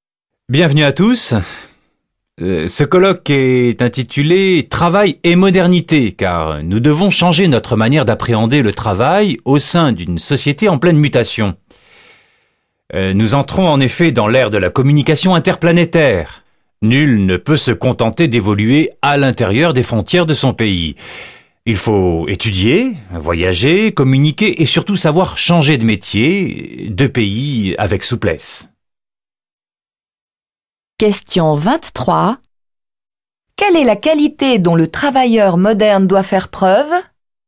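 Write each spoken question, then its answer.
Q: Quelle est la qualité dont le travailleur moderne doit faire preuve?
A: La souplesse, savoir changer de métier et de pays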